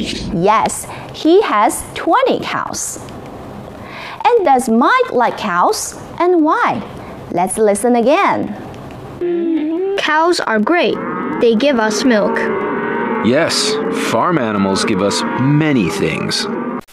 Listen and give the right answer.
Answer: Because Mike says cows are great. They give us milk.